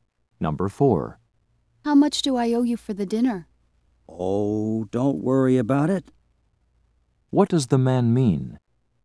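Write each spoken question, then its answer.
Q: What does the man mean?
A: He will pay for the dinner; she owes nothing.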